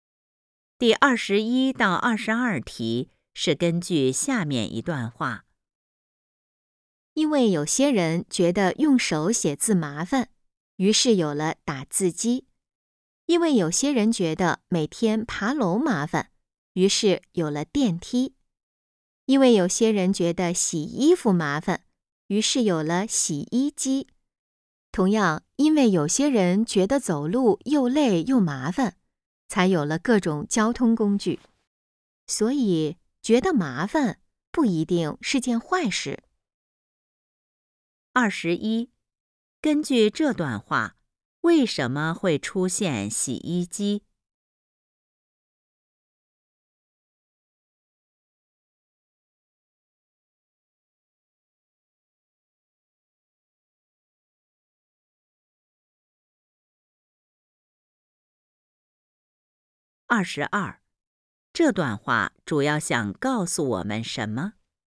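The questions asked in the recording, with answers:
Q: 根据这段话,为什么会出现洗衣机?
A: 有些人觉得洗衣服麻烦

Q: 这段话主要想告诉我们什么?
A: 觉得麻烦不一定是件坏事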